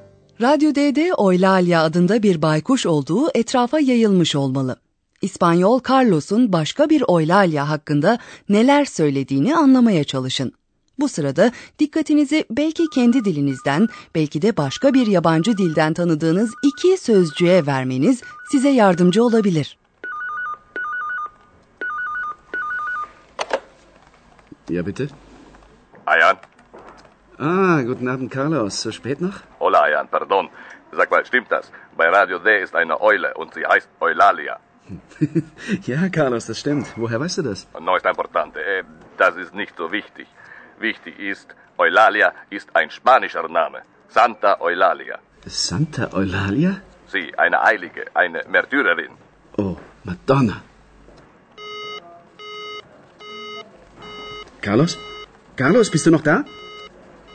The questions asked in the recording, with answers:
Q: İspanyol Carlos'un başka bir Oylalya hakkında neler söylediğini anlamaya çalışın.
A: Carlos, Santa Oylalya'dan, yani Azize Oylalya'dan söz ediyor.